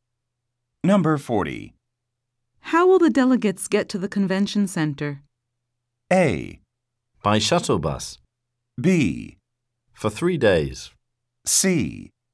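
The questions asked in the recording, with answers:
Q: How will the delegates get to the convention center?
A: A: By shuttle bus.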